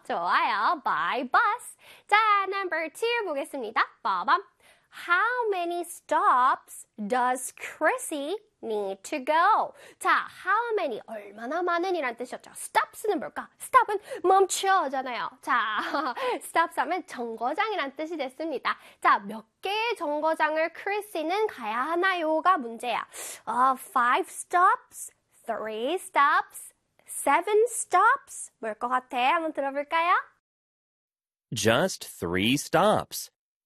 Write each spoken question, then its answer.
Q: How many stops does Chrissy need to go?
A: 그래서 정답은 B가 되겠습니다.